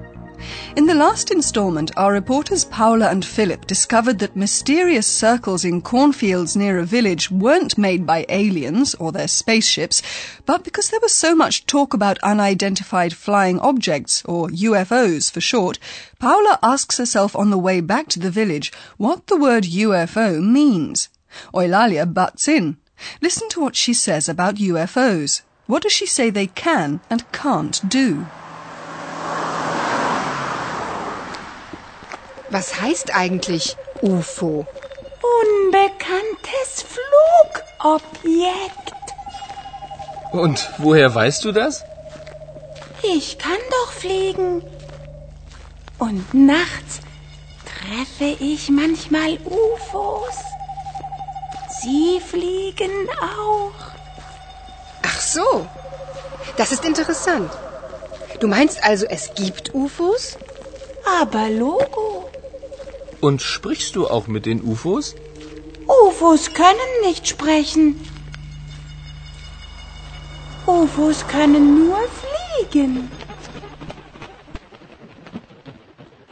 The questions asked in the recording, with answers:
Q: What does she say they can and can't do?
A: In Eulalia's opinion, anyway, UFOs can only fly.